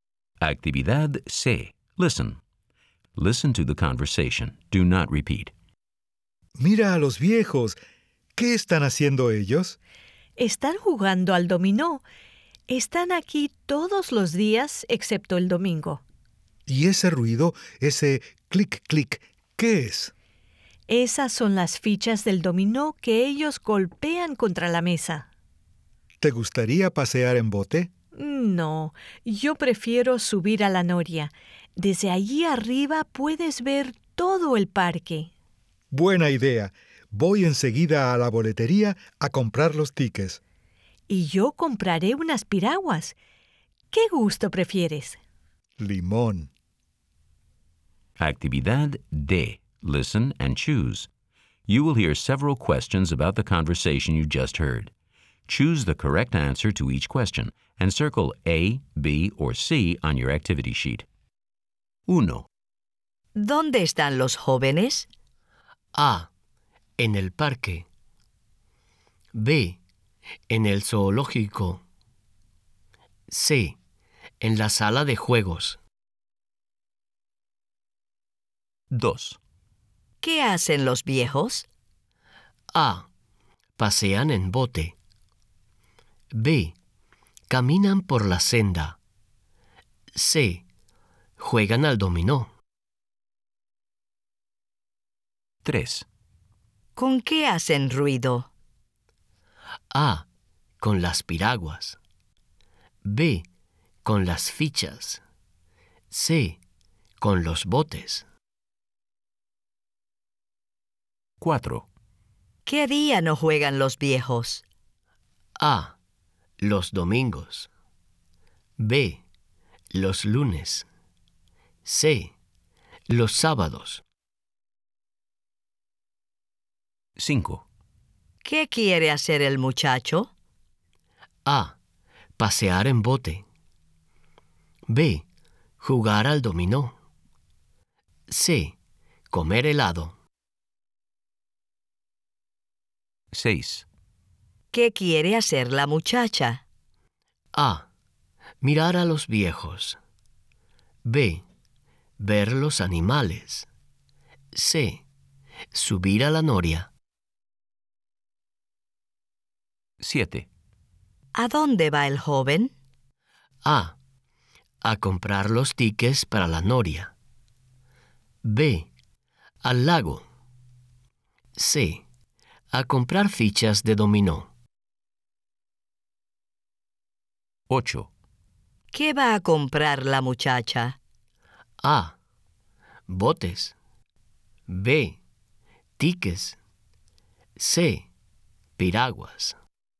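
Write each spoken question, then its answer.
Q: ¿Dónde están los jóvenes?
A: A: En el parque.

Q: ¿Qué hacen los viejos?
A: C: Juegan al dominó.

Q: ¿Con qué hacen ruido?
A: B: Con las fichas.

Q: ¿Qué día no juegan los viejos?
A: A: Los domingos.

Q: ¿Qué quiere hacer el muchacho?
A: A: Pasear en bote.

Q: ¿Qué quiere hacer la muchacha?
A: C: Subir a la noria.

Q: ¿A dónde va el joven?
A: A: A comprar los tickets para la noria.

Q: ¿Qué va a comprar la muchacha?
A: C: Piraguas.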